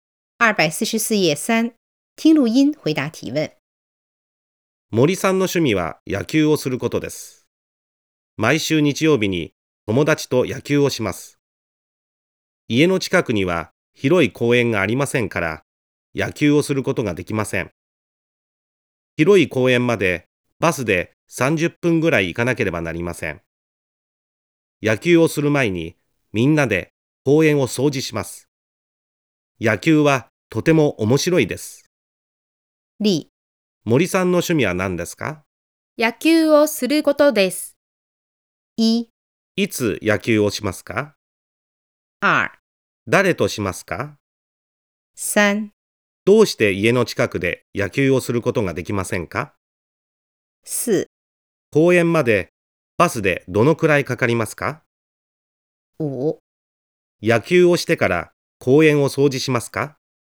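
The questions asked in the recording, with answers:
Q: いつ野球をしますか?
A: 毎週日曜日にします。

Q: 誰としますか?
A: 友達とします。

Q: どうして家の近くで野球をすることができませんか?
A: 家の近くには広い公園がありませんから。

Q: 公園までバスでどのくらいかかりますか?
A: 30分ぐらいかかります。

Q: 野球をしてから公園を掃除しますか?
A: いいえ、野球をする前に掃除します。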